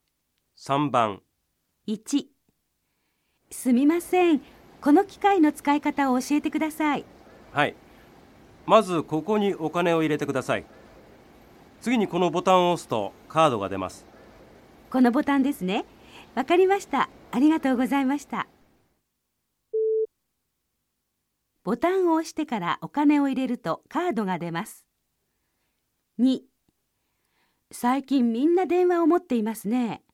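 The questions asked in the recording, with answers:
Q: ボタンを押してからお金を入れるとカードが出ます。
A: ×(お金を入れてからボタンを押す)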